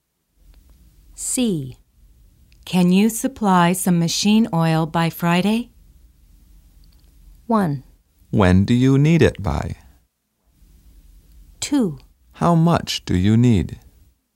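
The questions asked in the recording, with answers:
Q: Can you supply some machine oil by Friday?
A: 2: How much do you need?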